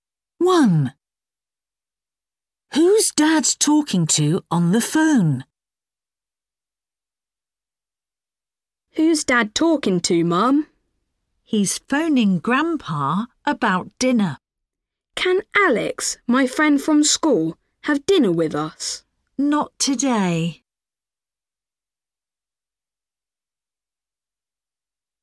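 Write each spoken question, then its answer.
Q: Who's Dad talking to on the phone?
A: Grandpa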